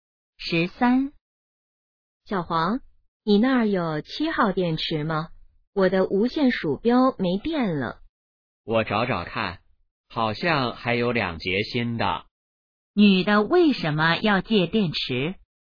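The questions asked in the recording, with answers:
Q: 女的为什么要借电池?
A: 无线鼠标没电了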